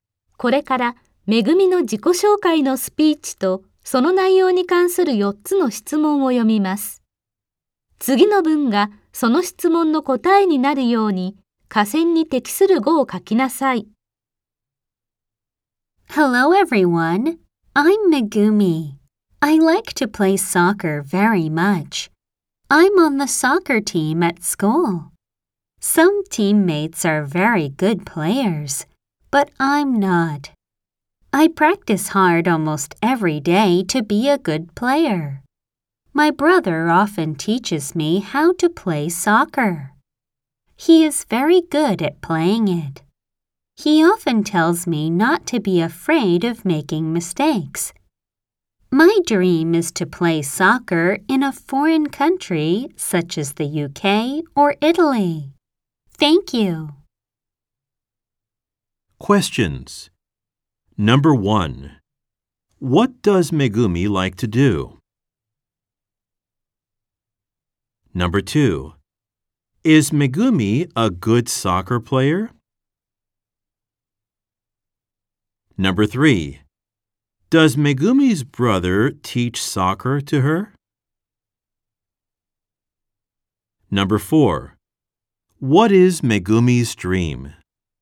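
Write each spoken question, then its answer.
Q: What does Megumi like to do?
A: She likes to play soccer.

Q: Is Megumi a good soccer player?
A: No, she isn't.

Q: Does Megumi's brother teach soccer to her?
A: Yes, he does.

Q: What is Megumi's dream?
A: To play soccer in a foreign country such as the UK or Italy.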